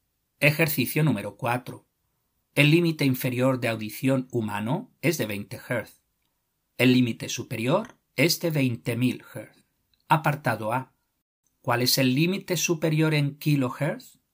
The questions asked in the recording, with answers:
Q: Apartado A. ¿Cuál es el límite superior en kilohertz?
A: 20.000 Hz es igual a 20 kilohertz.